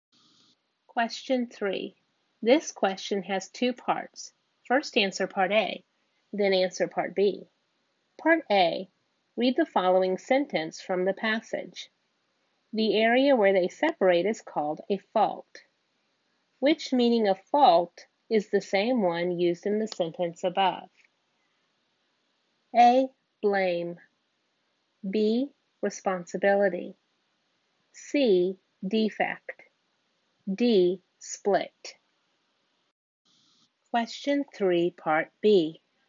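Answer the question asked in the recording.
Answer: D: Split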